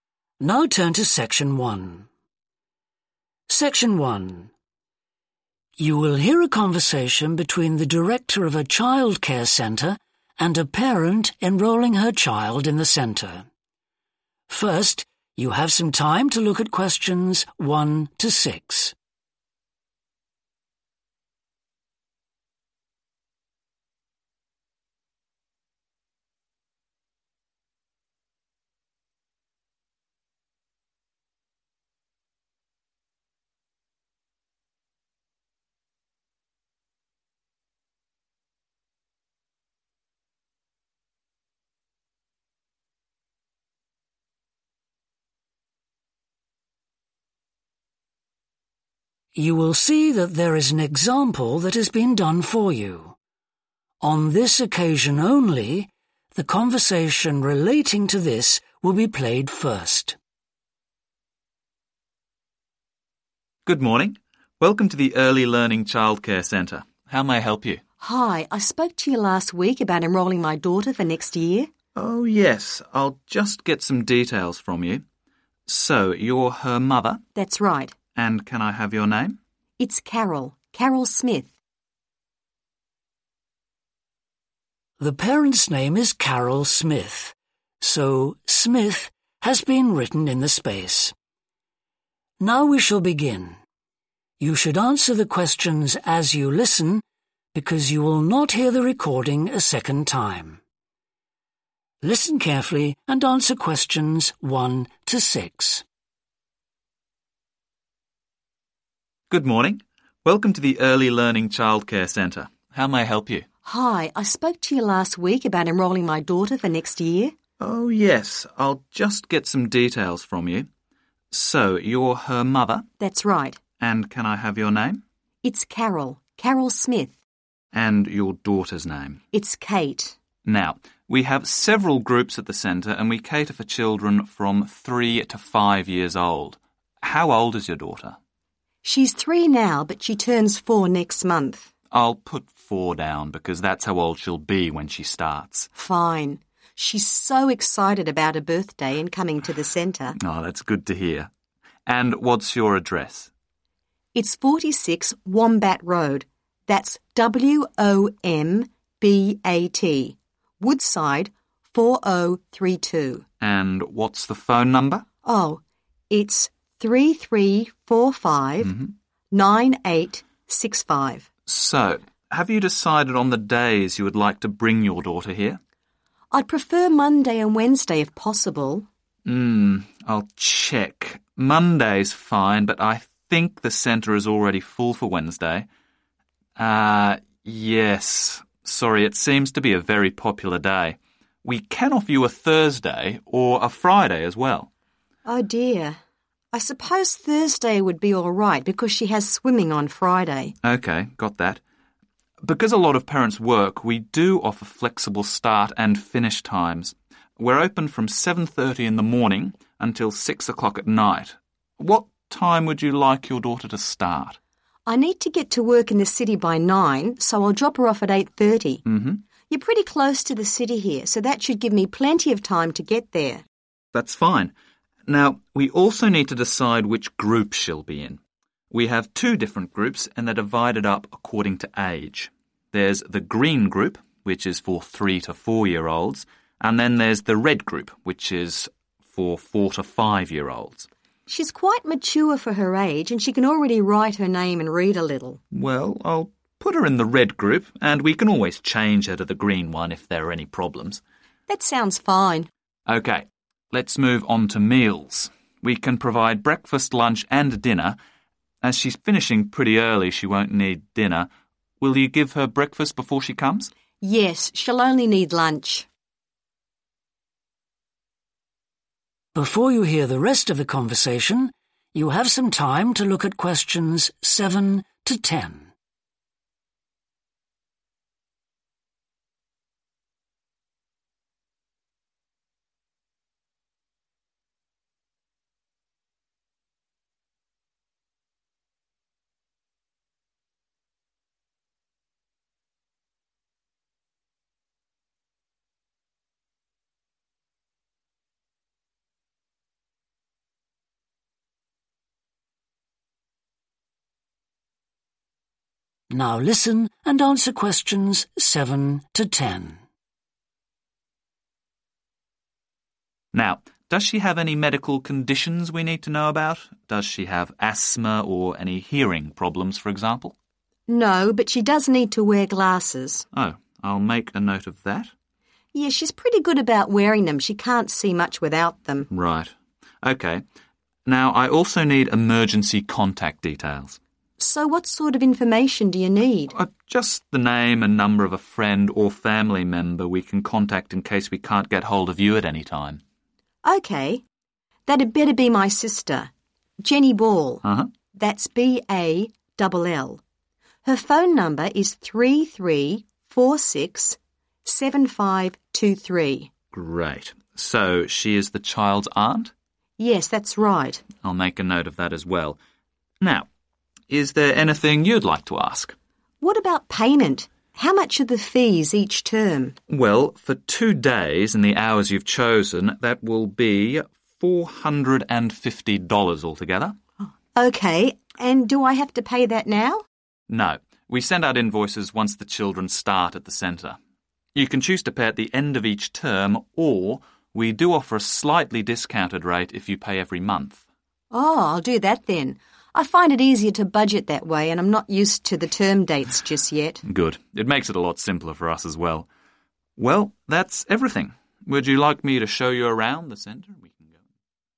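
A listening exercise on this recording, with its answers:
Complete the form below. Write ONE WORD OR A NUMBER.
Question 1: Age: 1.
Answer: 4

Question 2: Address: 2. Road, Woodside, 4032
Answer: 46 Wombat

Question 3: Days enrolled for: Monday and 3.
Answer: Thursday

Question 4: Start time: 4. AM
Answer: 8:30

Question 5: Childcare group: the 5. group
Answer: red

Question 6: Which meals are required each day? 6.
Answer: lunch

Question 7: Medical conditions: needs 7.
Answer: glasses

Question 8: Emergency contact: Jenny 8.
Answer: Ball

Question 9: Relationship to child: 9.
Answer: aunt

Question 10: Will pay each10.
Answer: month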